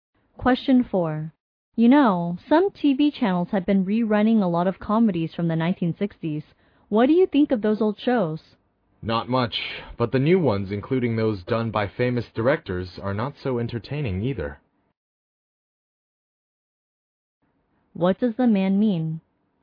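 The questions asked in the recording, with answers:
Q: What does the man mean?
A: Neither the old shows nor the new ones are very entertaining.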